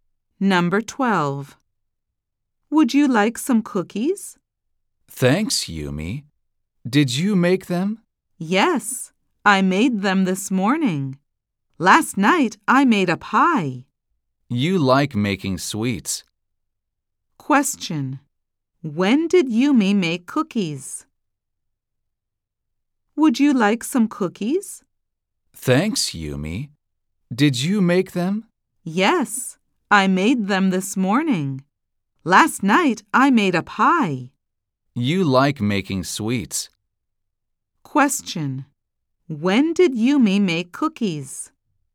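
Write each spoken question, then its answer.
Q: When did Yumi make cookies?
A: This morning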